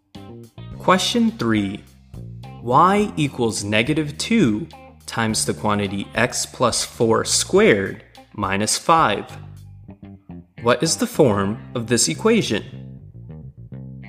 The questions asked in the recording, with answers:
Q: What is the form of this equation?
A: This equation is in the vertex form.